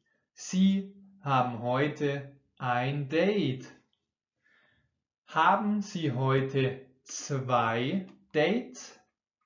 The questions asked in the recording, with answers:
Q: Haben Sie heute zwei Dates?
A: Nein, Sie haben heute nicht zwei Dates, sondern ein Date.